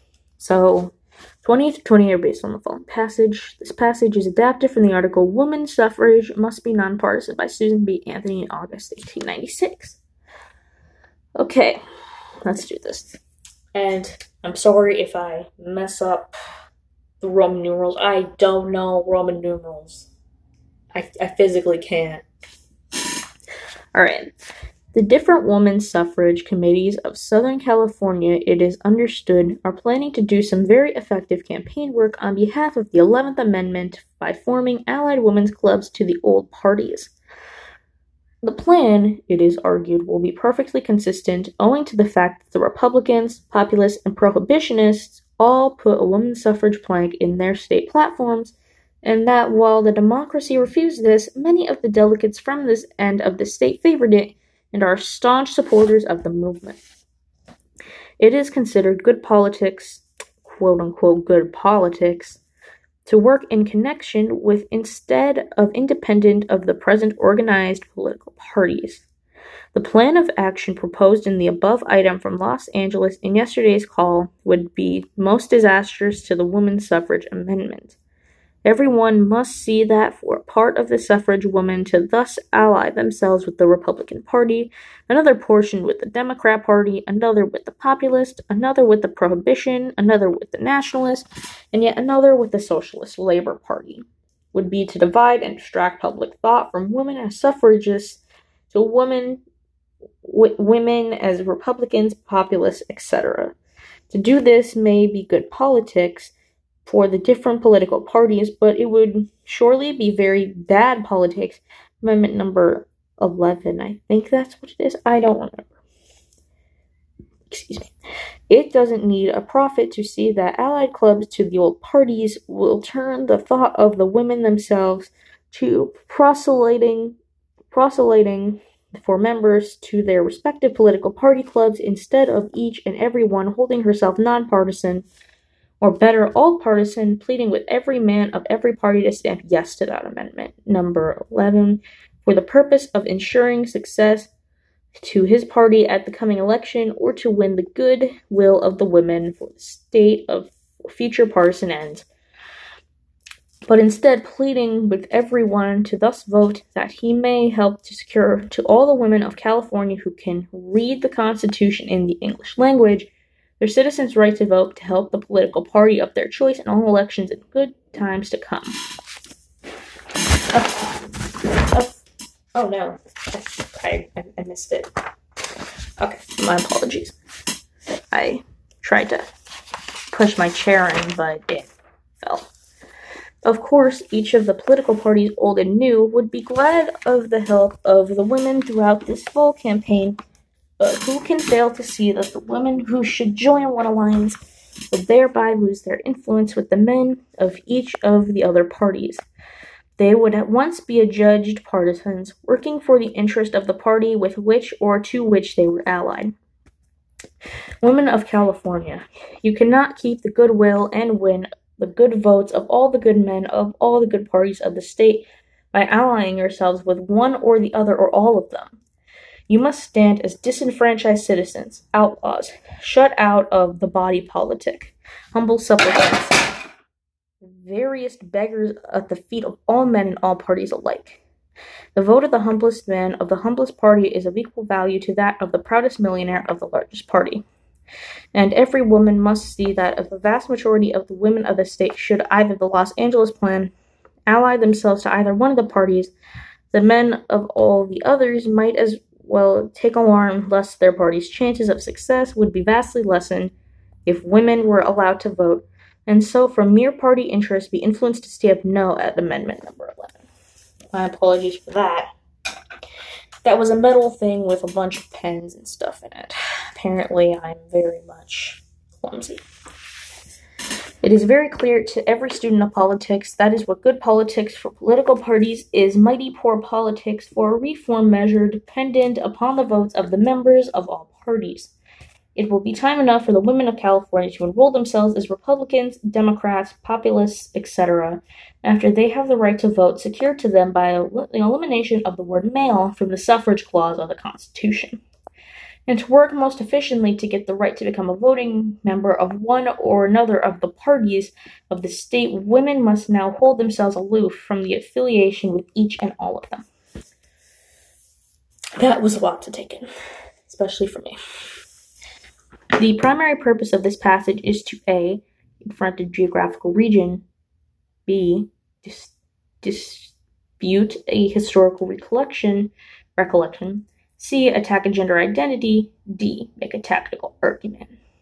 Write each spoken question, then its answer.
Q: The primary purpose of this passage is to A, confront a geographical region, B, dispute a historical recollection, C, attack a gender identity. D, make a tactical argument.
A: So I'd say this is D, make a tactical argument.